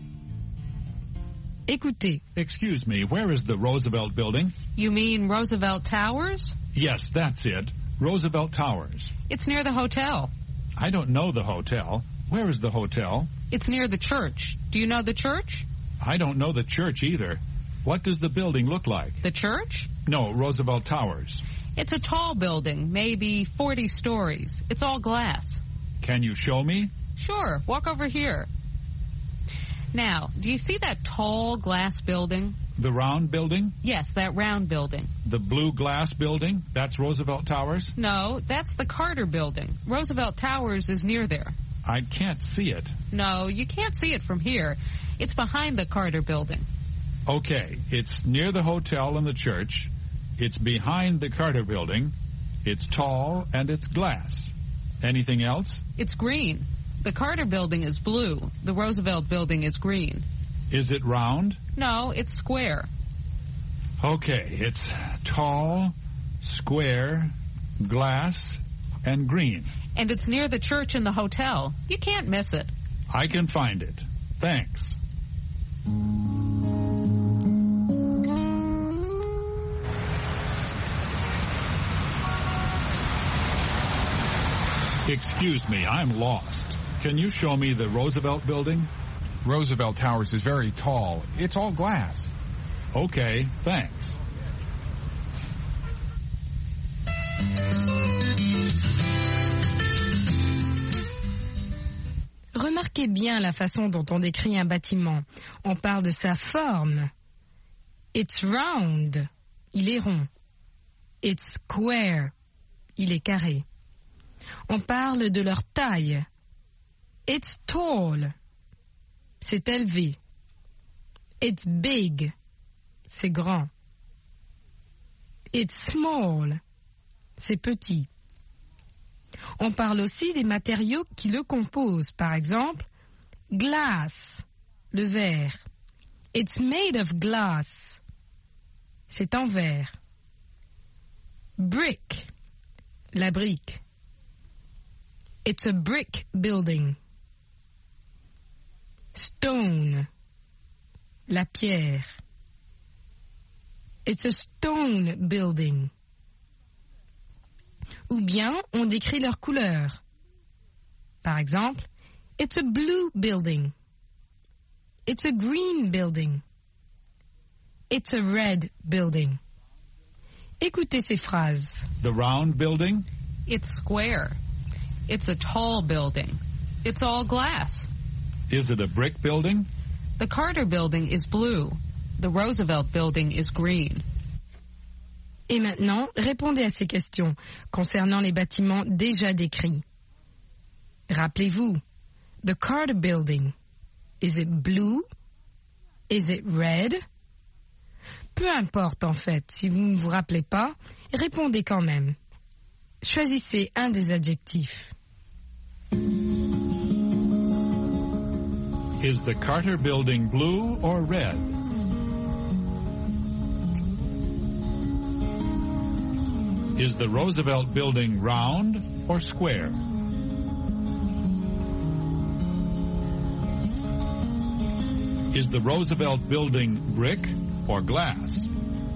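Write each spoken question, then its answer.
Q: Is the Carter Building blue or red?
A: blue

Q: Is the Roosevelt Building round or square?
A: square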